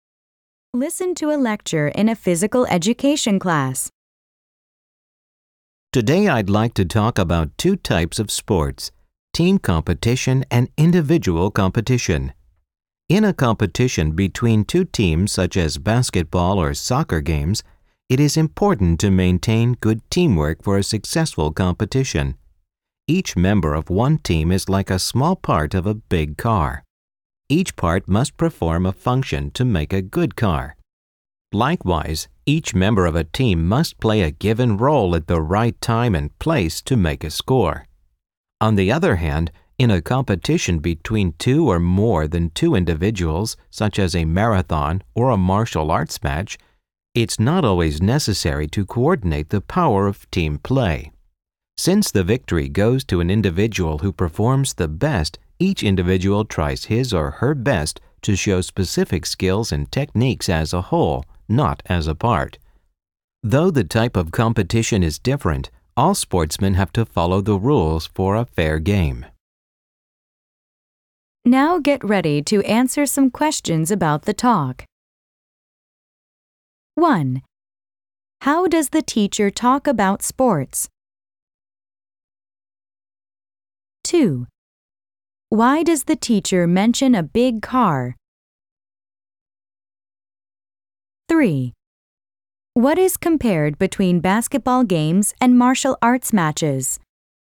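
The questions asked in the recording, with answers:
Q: How does the teacher talk about sports?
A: By comparing team competition and individual competition

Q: Why does the teacher mention a big car?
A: To explain that each team member must play their role, like a part of a car

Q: What is compared between basketball games and martial arts matches?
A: Whether teamwork is needed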